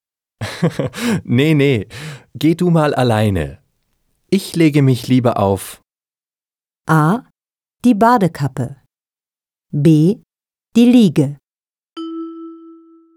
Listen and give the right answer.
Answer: B. Ich lege mich lieber auf die Liege.